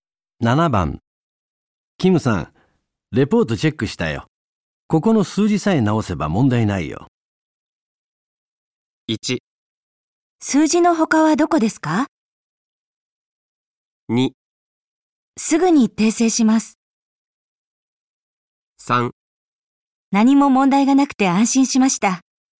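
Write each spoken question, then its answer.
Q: キムさん、レポートチェックしたよ。ここの数字さえ直せば問題ないよ。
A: 2: すぐに訂正します。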